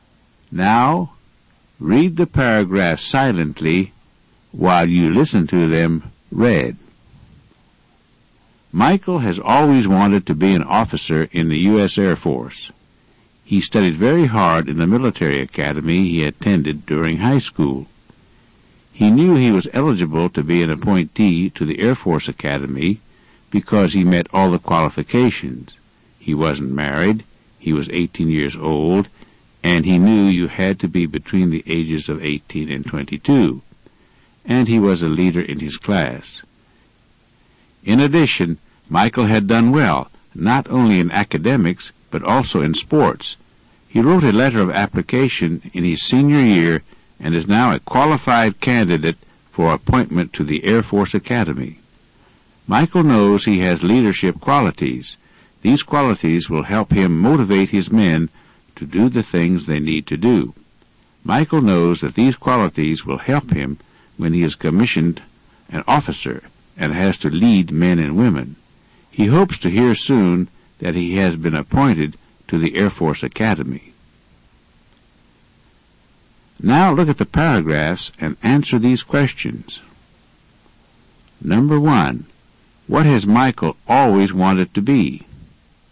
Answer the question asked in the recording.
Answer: Michael has always wanted to be an officer in the U.S.